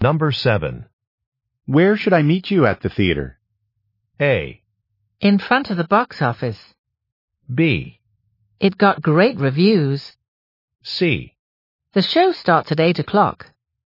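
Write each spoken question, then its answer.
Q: Where should I meet you at the theater?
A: A: In front of the box office.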